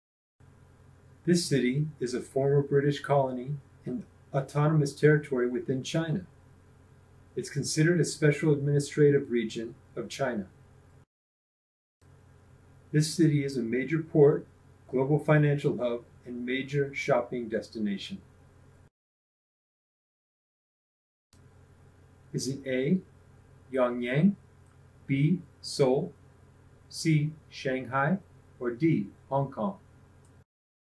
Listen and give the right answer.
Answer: If you chose Hong Kong, you're correct.